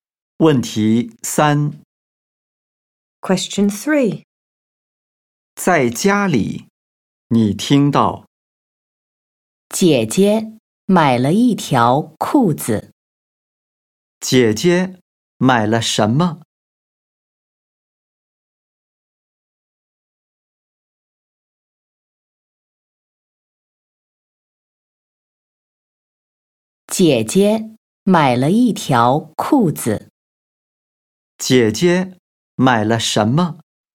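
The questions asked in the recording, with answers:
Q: 姐姐买了什么?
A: 一条裤子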